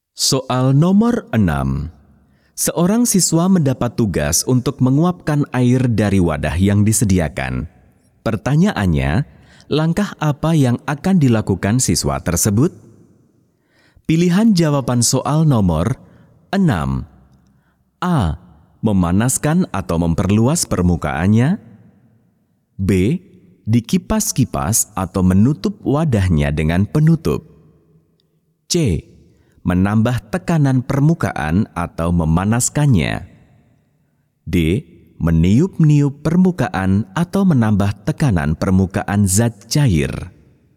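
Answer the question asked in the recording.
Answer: A: Memanaskan atau memperluas permukaannya.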